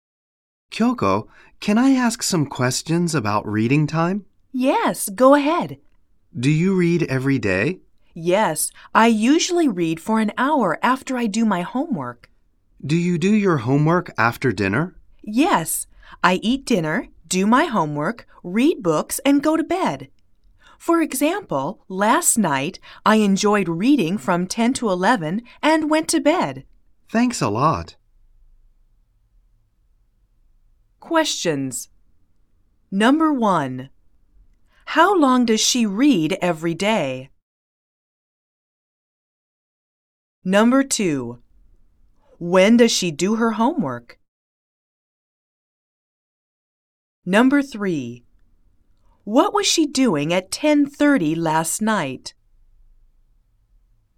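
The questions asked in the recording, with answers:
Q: How long does she read every day?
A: For an hour

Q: When does she do her homework?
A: After dinner

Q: What was she doing at 10:30 last night?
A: She was reading (books)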